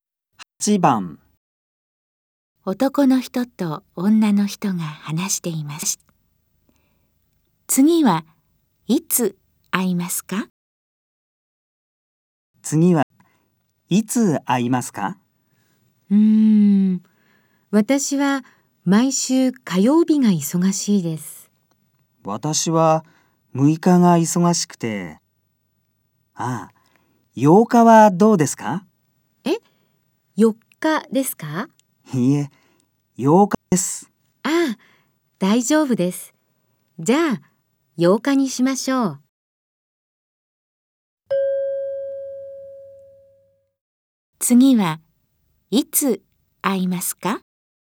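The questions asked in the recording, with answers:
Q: 次はいつ会いますか?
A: 8日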